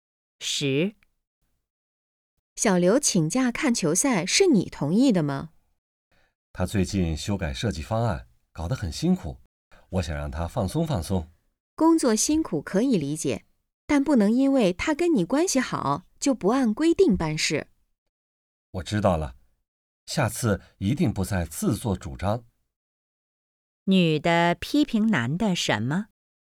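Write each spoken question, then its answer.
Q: 女的批评男的什么?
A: 自作主张,不按规定办事,同意小刘请假看球赛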